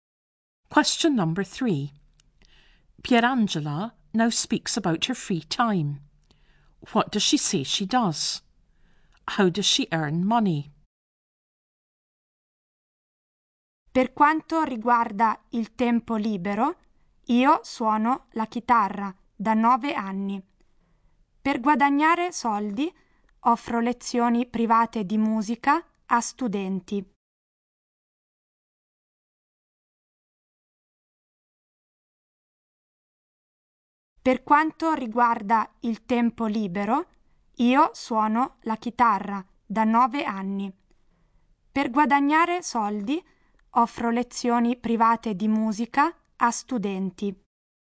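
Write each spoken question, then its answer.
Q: What does she say she does?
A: She has played the guitar for 9 years

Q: How does she earn money?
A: She gives private music lessons to students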